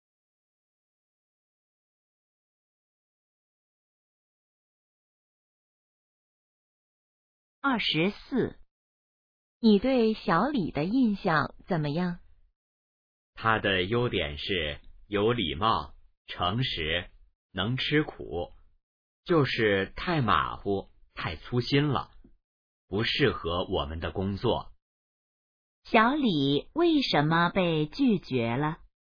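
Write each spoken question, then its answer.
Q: 小李为什么被拒绝了?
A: 太马虎、太粗心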